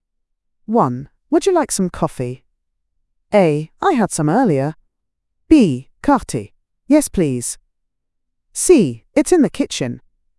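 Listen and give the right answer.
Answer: B: Yes, please.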